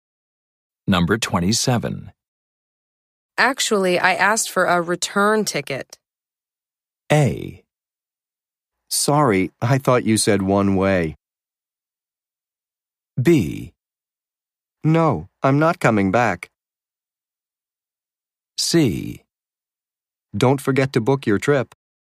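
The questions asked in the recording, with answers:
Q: Actually, I asked for a return ticket.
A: A: Sorry, I thought you said one way.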